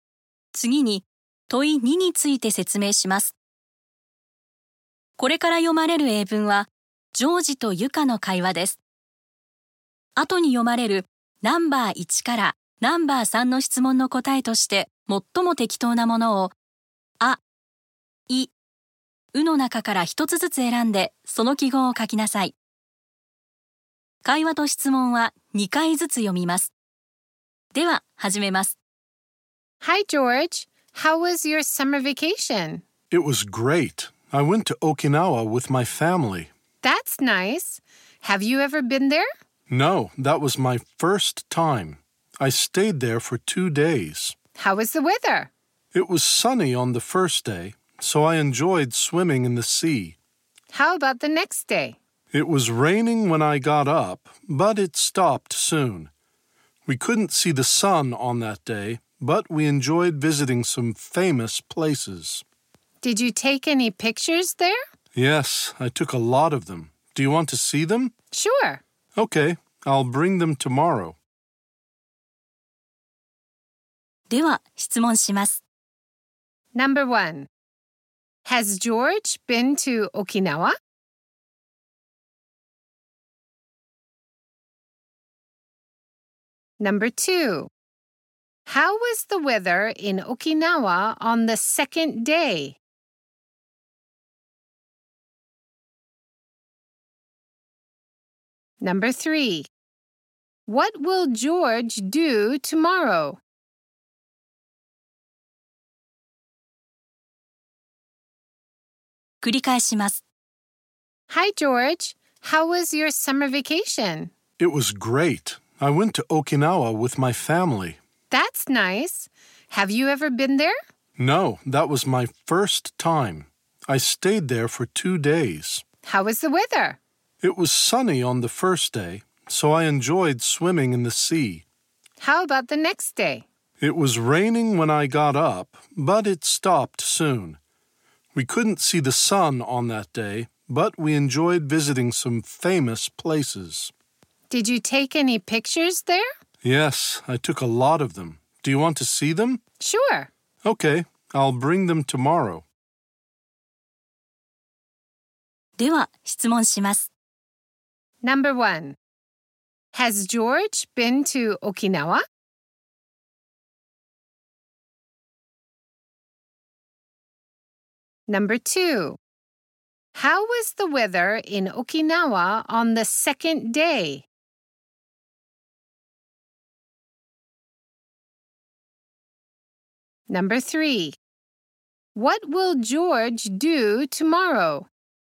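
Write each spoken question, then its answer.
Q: How was the weather in Okinawa on the second day?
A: It was rainy in the morning, then cloudy.

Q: What will George do tomorrow?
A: He will bring his pictures of Okinawa.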